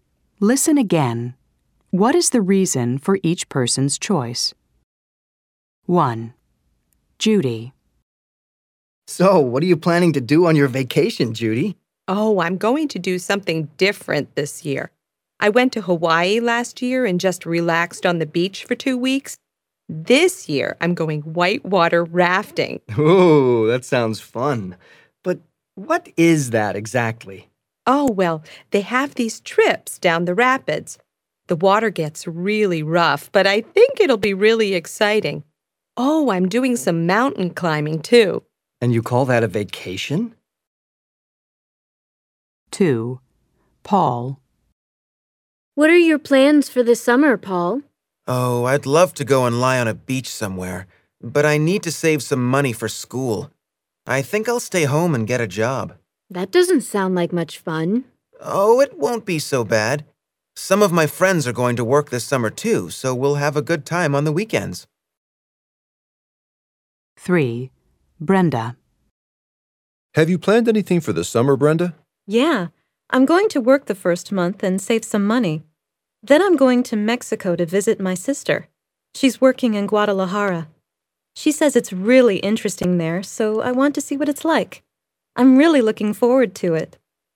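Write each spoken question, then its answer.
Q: What is the reason for each person's choice?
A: Judy wants to do something different and exciting this year (whitewater rafting) instead of relaxing on the beach again.

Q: What is the reason for each person's choice?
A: Paul needs to save money for school, so he'll stay home and get a job.

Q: What is the reason for each person's choice?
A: Brenda wants to visit her sister in Mexico and see what Guadalajara is like.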